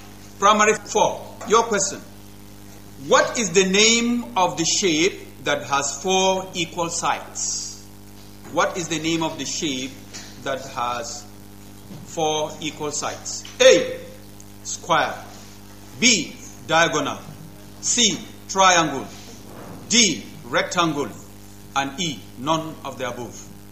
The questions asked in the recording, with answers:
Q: What is the name of the shape that has 4 equal sides?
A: Yes, that's the correct answer.